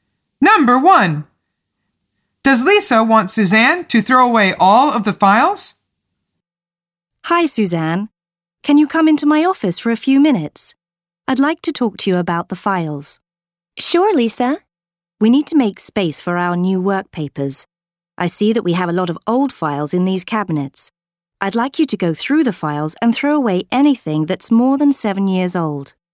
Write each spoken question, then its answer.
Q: Does Lisa want Suzanne to throw away all of the files?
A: The answer is no. She says, throw away anything that is more than 7 years old.